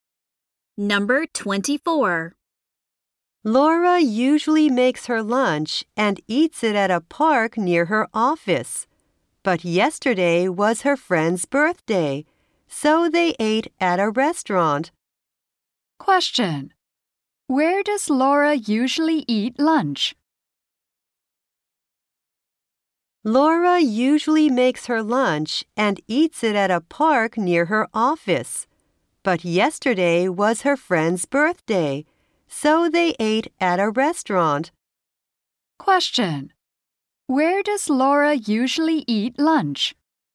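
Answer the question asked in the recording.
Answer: At a park near her office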